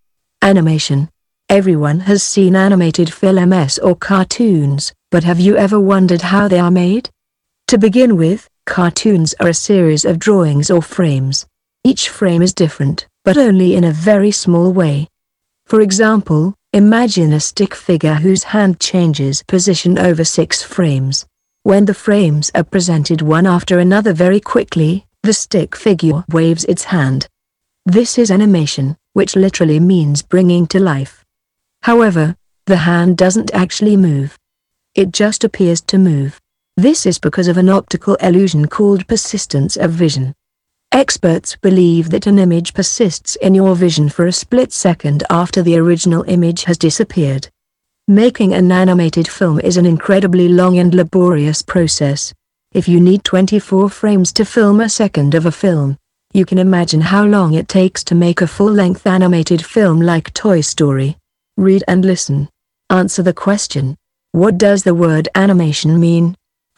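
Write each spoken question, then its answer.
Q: What does the word animation mean?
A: Bringing to life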